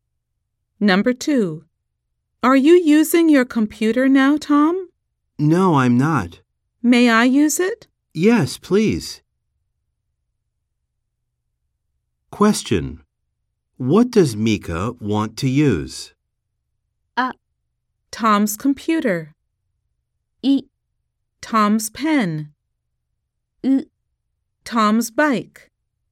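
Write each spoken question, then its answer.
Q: What does Mika want to use?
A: A: Tom's computer.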